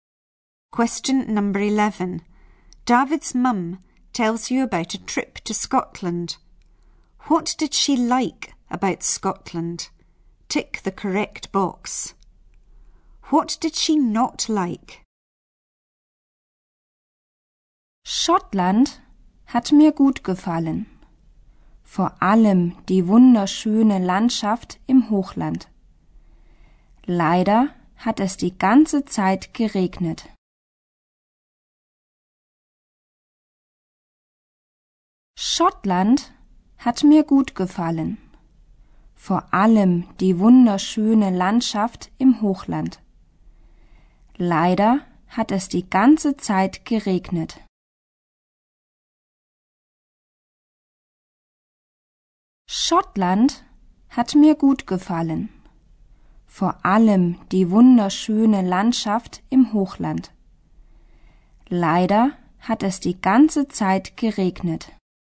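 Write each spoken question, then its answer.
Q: What did she not like?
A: It rained the whole time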